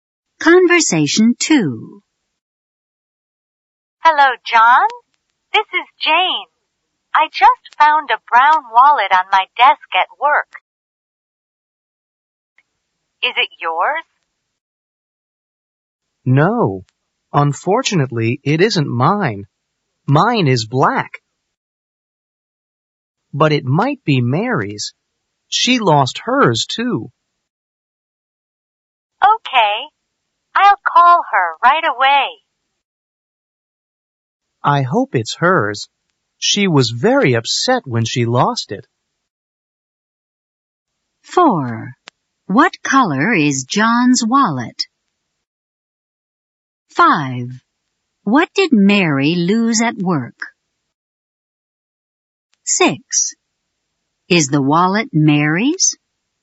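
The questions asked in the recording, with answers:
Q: What color is John's wallet?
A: Black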